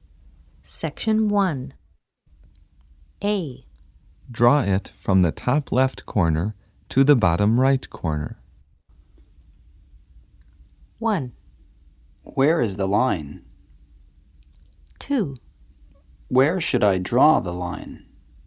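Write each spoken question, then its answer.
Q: Draw it from the top left corner to the bottom right corner.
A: 2: Where should I draw the line?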